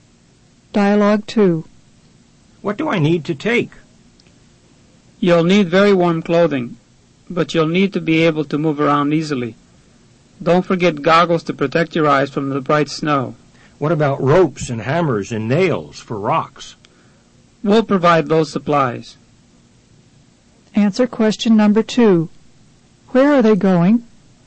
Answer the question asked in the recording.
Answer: Number 2 is A.